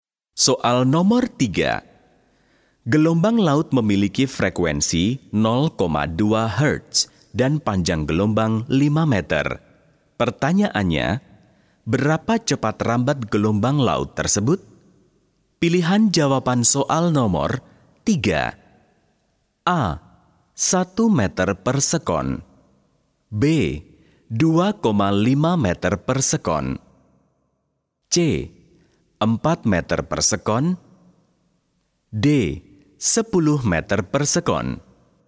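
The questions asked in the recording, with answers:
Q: Pertanyaannya, berapa cepat rambat gelombang laut tersebut?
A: A: 1 meter per sekon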